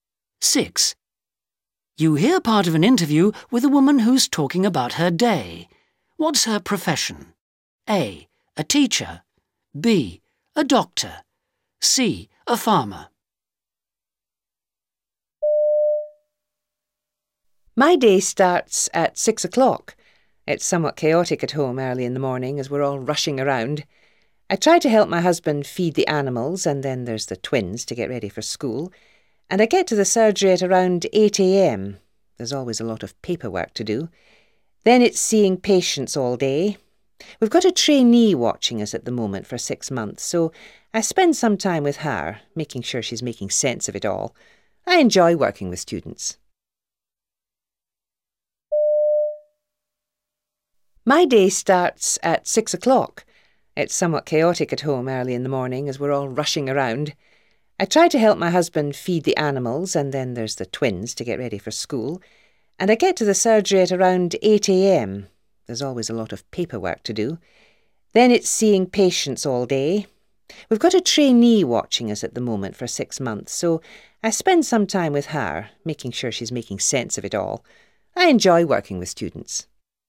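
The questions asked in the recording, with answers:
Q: What's her profession?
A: B: A doctor.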